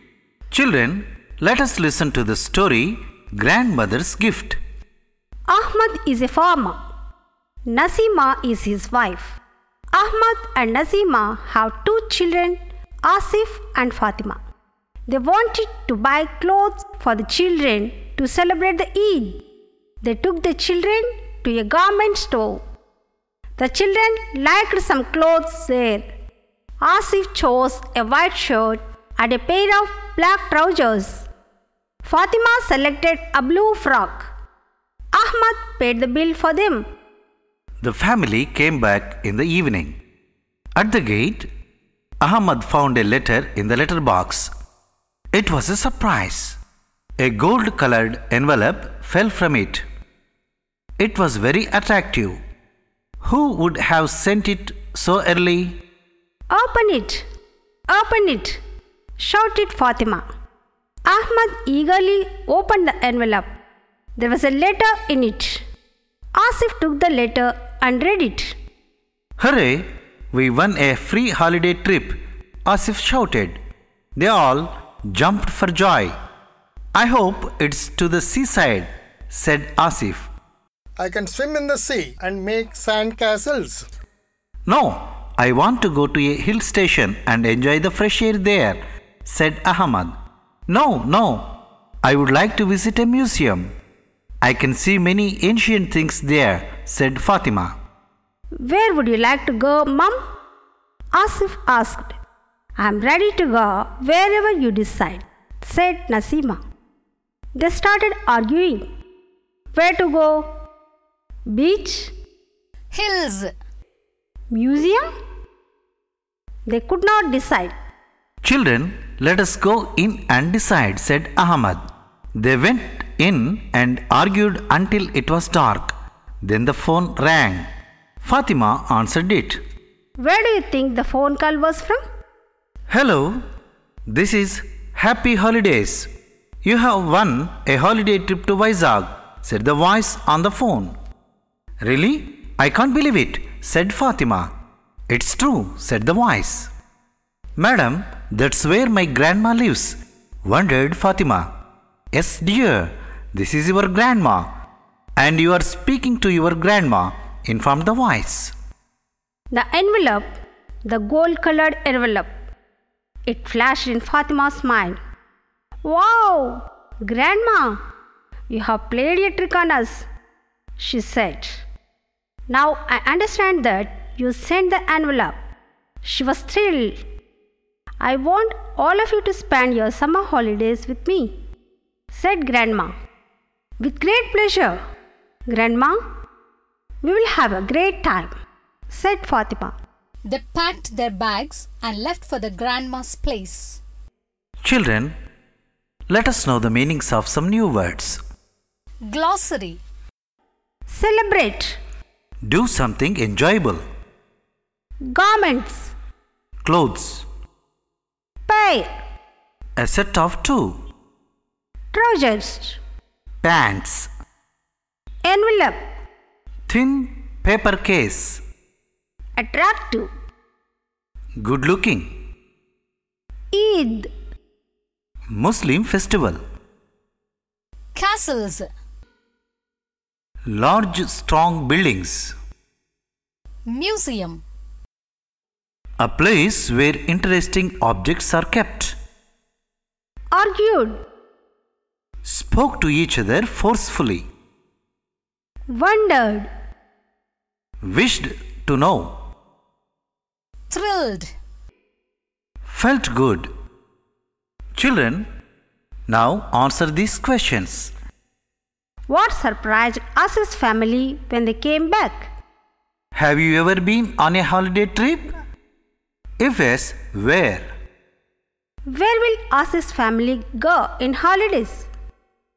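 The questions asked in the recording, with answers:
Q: What surprised us's family when they came back?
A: A gold-colored envelope in the letterbox

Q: Where will us's family go in holidays?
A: To Grandma's place in Vizag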